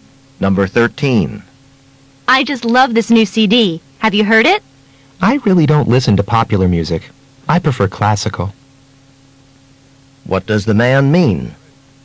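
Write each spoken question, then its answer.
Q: What does the man mean?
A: He hasn't heard it; he prefers classical music.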